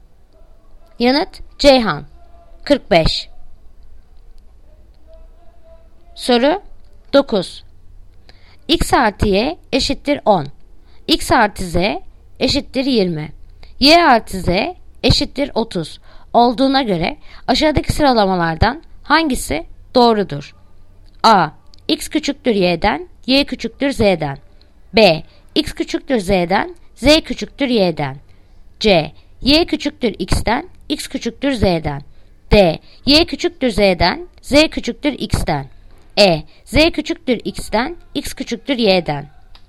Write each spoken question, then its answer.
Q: Olduğuna göre aşağıdaki sıralamalardan hangisi doğrudur?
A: Yanıt Adana. X küçüktür Y'den, Y küçüktür Z'den.